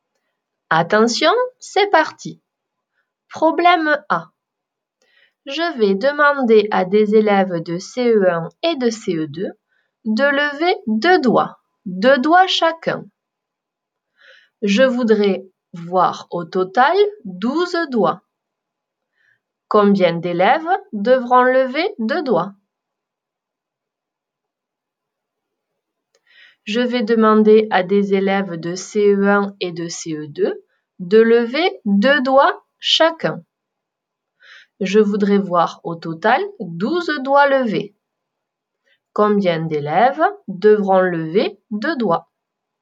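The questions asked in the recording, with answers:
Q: Combien d'élèves devront lever deux doigts?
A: 6 élèves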